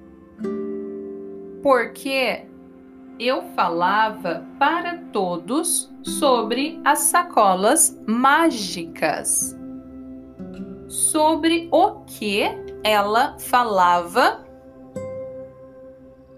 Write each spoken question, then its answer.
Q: Sobre o que ela falava?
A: Sobre as sacolas mágicas.